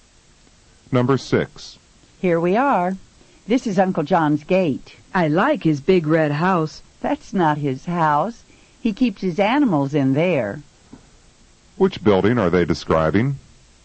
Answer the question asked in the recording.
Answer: The big red building that Uncle John keeps animals in is his barn.